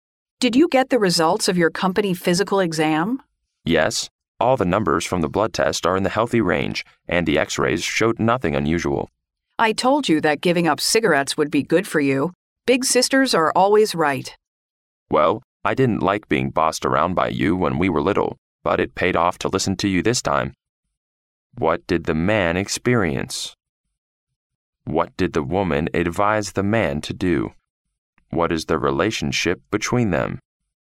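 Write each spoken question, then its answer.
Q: What did the man experience?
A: A company physical exam with healthy results

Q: What did the woman advise the man to do?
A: Give up cigarettes

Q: What is the relationship between them?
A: Brother and sister

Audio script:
[听力原文] W: Did you get the results of your company physical exam? M: Yes, all the numbers from the blood test are in the healthy range, and the X-rays showed nothing unusual. W: I told you that giving up cigarettes would be good for you. Big sisters are always Right. M: Well, I didn't like being bossed around by you when we were little, but it paid off to listen to you this time.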